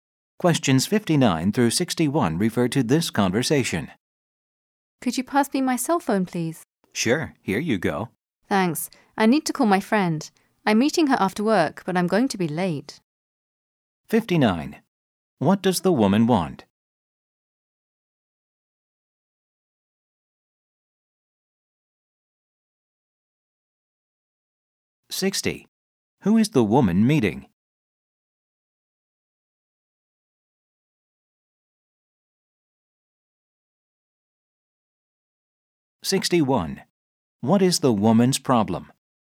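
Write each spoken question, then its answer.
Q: What does the woman want?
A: Her cell phone

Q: Who is the woman meeting?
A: Her friend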